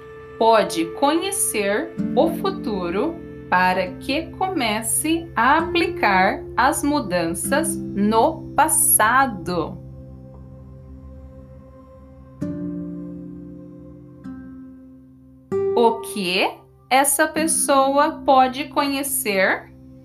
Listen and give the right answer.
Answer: o futuro. Essa pessoa pode conhecer o futuro.